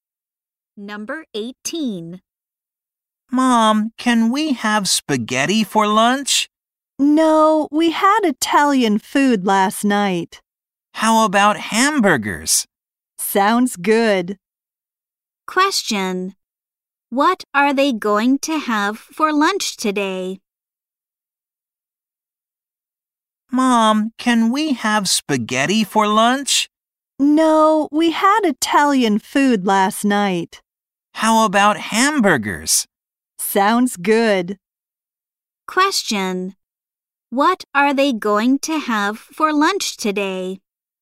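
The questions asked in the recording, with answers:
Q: What are they going to have for lunch today?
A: Hamburgers.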